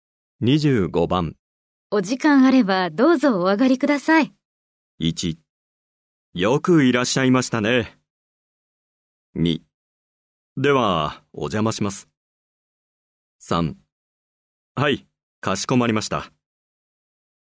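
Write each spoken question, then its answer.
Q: お時間あればどうぞお上がりください。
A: 2: では、お邪魔します。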